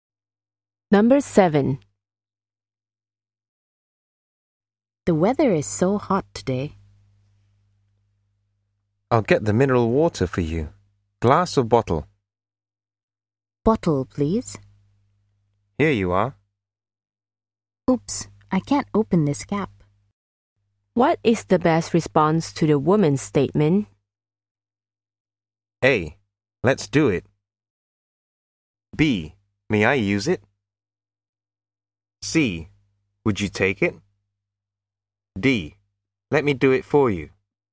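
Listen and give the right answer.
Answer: D: Let me do it for you.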